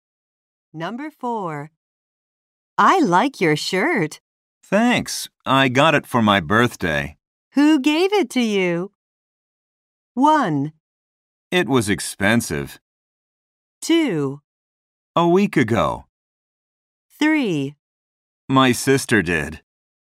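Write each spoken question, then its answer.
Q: Who gave it to you?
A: 3: My sister did.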